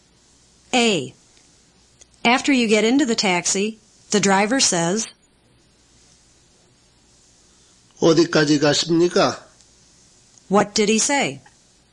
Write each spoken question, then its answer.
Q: What did he say?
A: He said, where are you going?